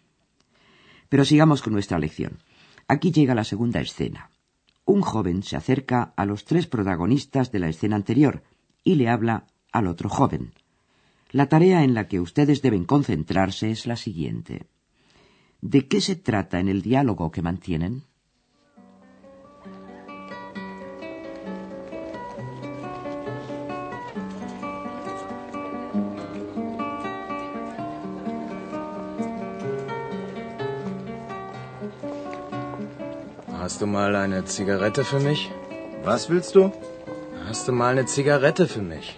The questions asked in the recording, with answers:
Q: ¿De qué se trata en el diálogo que mantienen?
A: el joven que llega le pregunta al otro que si tiene un cigarrillo para él.